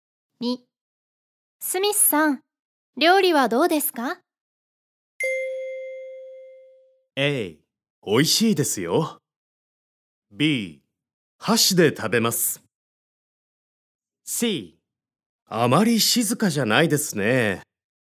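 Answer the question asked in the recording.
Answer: A: 美味しいですよ。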